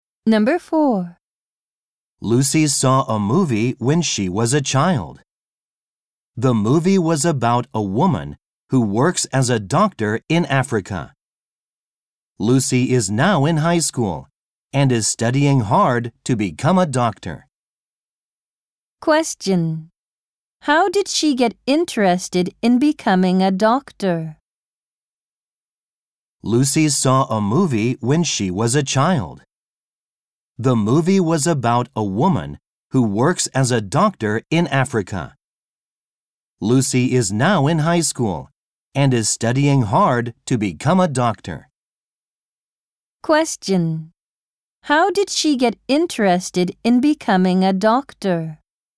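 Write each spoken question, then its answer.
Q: How did she get interested in becoming a doctor?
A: She saw a movie about a woman working as a doctor in Africa when she was a child.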